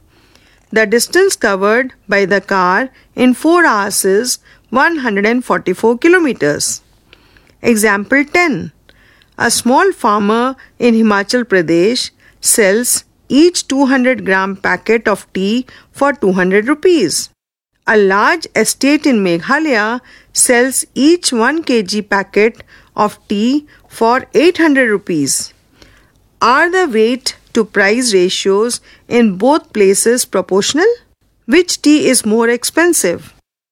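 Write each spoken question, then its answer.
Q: Are the weight to price ratios in both places proportional?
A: No

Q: Which tea is more expensive?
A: The Himachal tea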